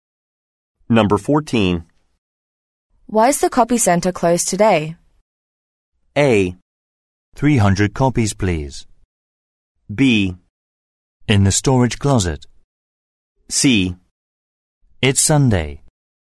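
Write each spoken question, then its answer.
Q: Why is the copy center closed today?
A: C: It's Sunday.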